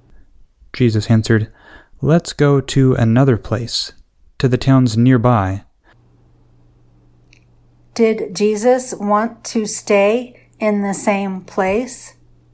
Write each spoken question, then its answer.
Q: Did Jesus want to stay in the same place?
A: No, Jesus wanted to go to another place.